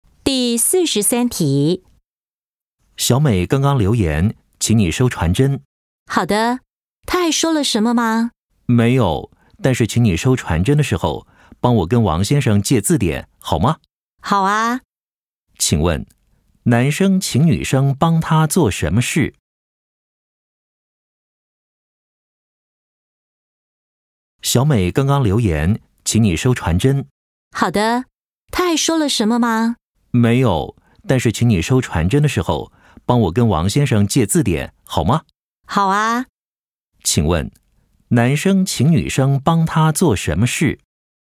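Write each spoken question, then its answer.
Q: 请问,男生请女生帮他做什么事?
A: 跟王先生借字典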